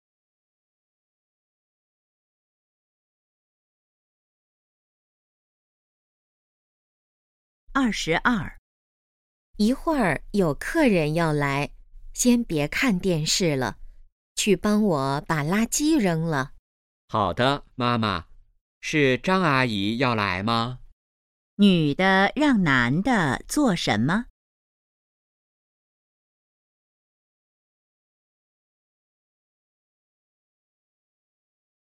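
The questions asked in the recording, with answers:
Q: 女的让男的做什么?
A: 扔垃圾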